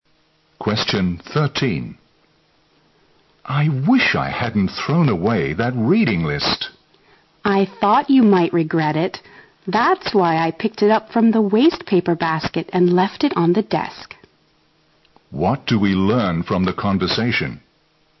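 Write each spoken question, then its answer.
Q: What do we learn from the conversation?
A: The woman rescued the reading list from the wastebasket; it is on the desk.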